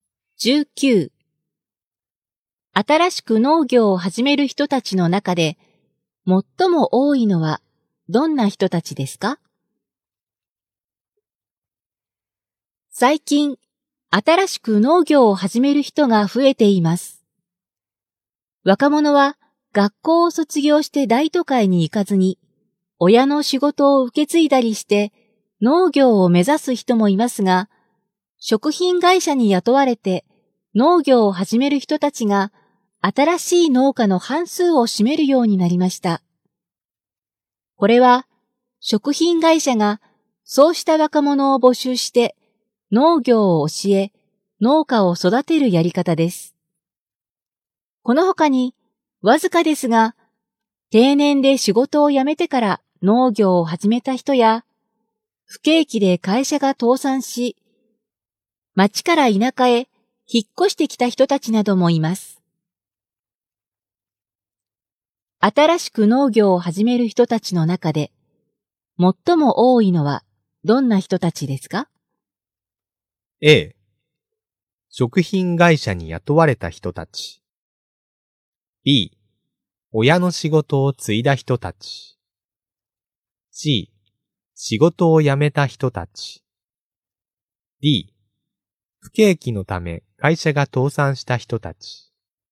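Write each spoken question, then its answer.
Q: 新しく農業を始める人たちの中で、最も多いのはどんな人たちですか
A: A: 食品会社に雇われた人たち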